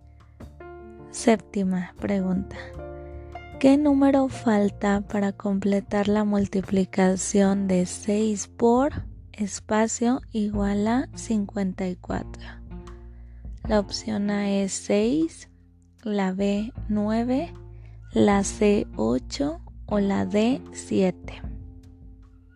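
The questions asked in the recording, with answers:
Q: ¿Qué número falta para completar la multiplicación de 6 por espacio igual a 54?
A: B: 9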